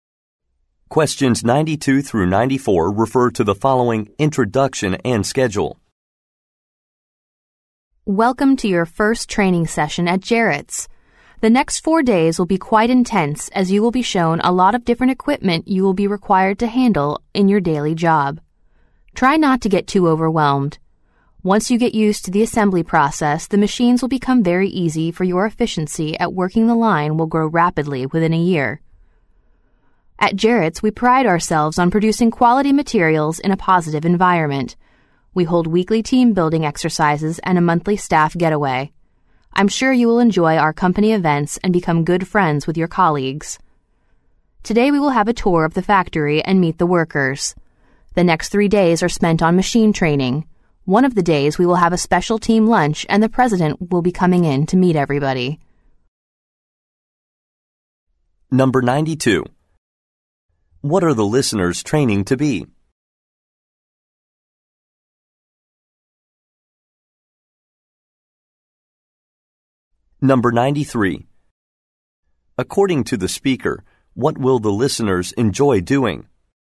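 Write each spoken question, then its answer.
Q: According to the speaker, what will the listeners enjoy doing?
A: Taking part in company events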